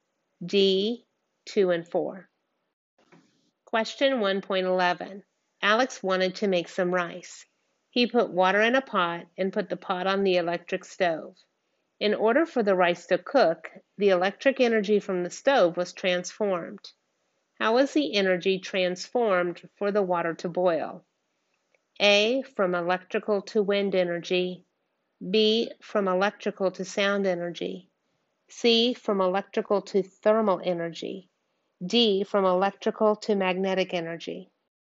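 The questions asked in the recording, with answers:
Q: How was the energy transformed for the water to boil?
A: C: from electrical to thermal energy.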